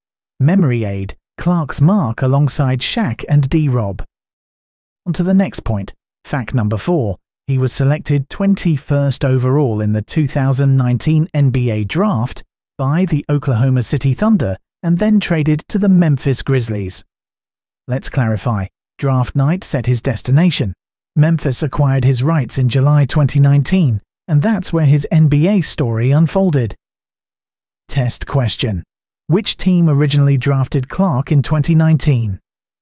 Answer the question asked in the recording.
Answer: Correct answer. Oklahoma City Thunder.